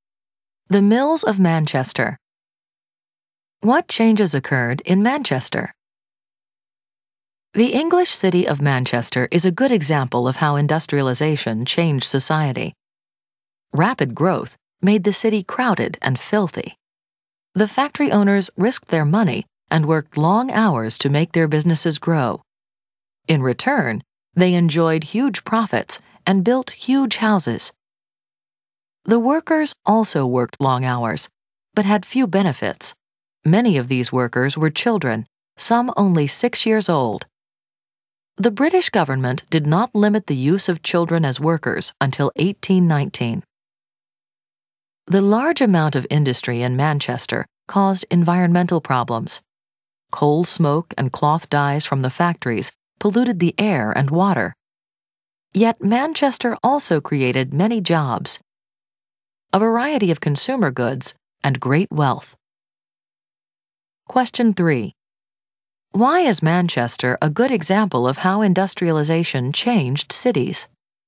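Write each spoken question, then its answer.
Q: Why is Manchester a good example of how industrialization changed cities?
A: It grew fast and became crowded, dirty and polluted, with child labor and long hours, but it also created jobs, consumer goods and great wealth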